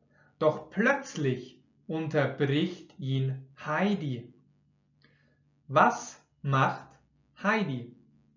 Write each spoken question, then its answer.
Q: Was macht Heidi?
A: Sie unterbricht ihn. Heidi unterbricht ihn.